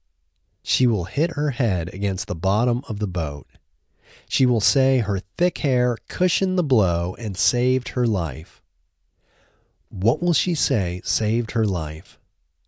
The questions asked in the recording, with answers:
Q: What will she say saved her life?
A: She will say her thick hair saved her life.